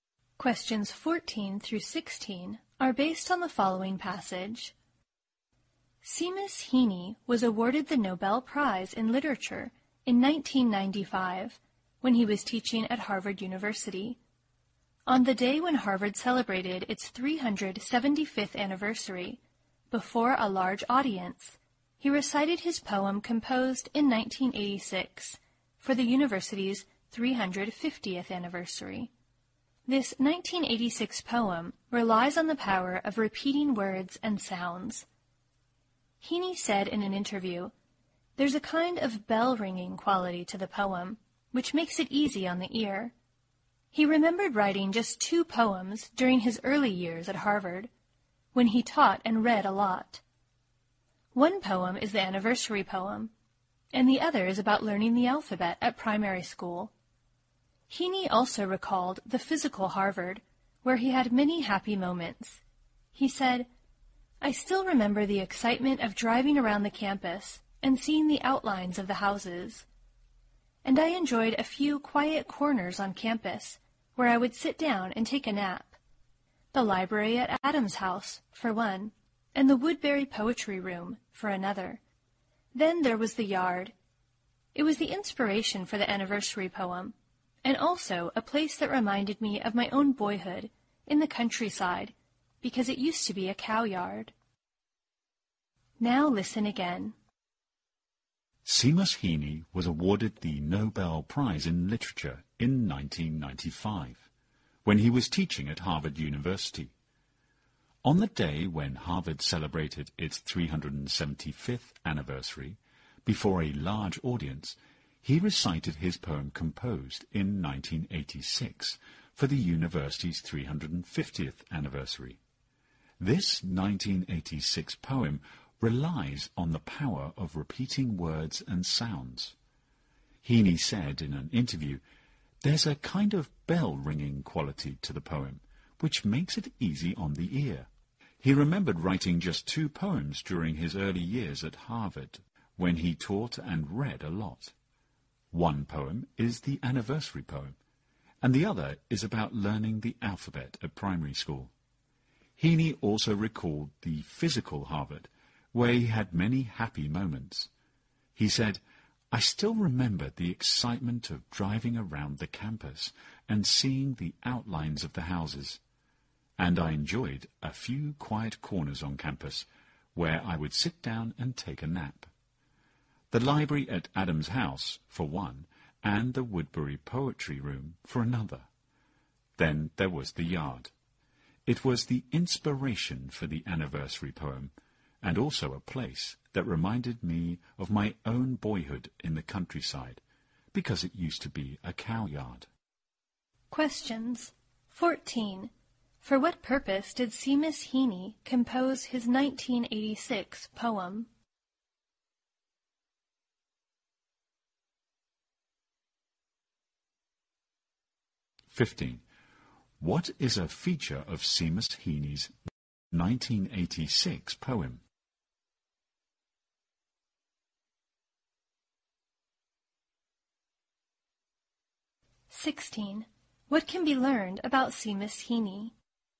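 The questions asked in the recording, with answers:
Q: For what purpose did Seamus Heaney compose his 1986 poem?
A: For Harvard's 350th anniversary.

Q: What is a feature of Seamus Heaney's 1986 poem?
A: It relies on repeating words and sounds.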